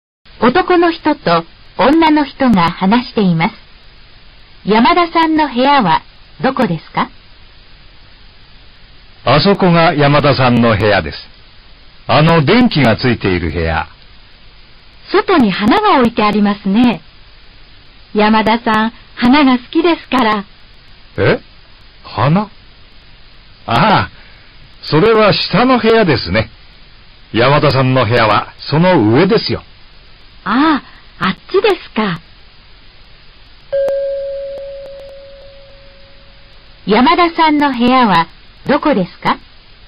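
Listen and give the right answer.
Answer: 電気がついている部屋で、花が置いてある部屋の上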